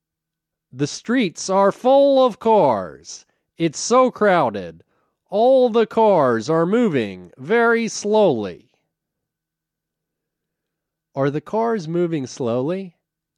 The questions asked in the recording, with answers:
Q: Are the cars moving slowly?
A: Yes, the cars are moving slowly.